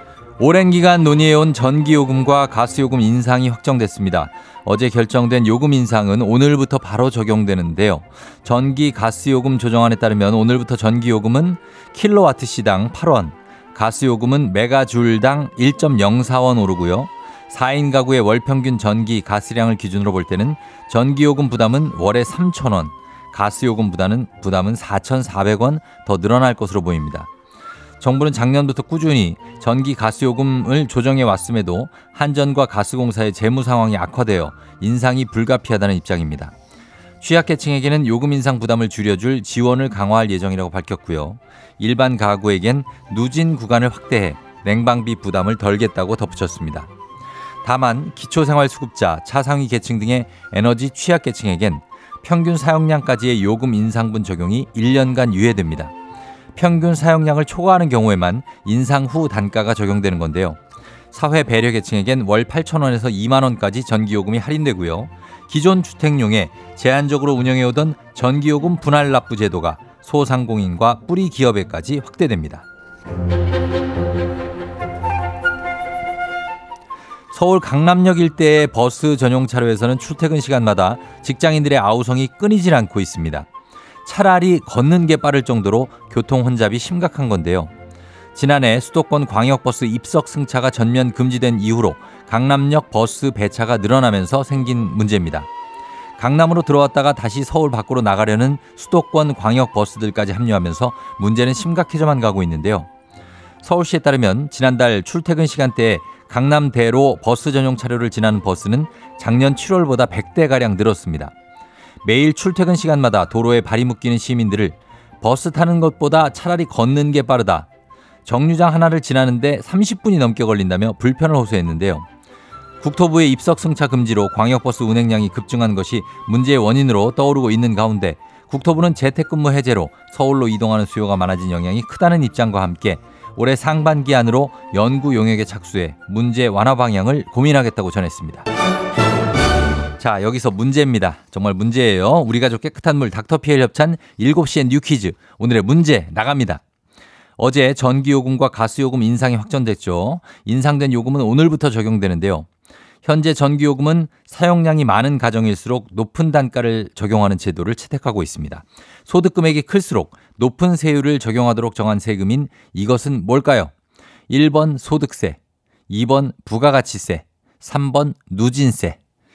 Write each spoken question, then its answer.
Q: 소득 금액이 클수록 높은 세율을 적용하도록 정한 세금인 이것은 뭘까요?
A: 이것은 정답 3번 누진세입니다.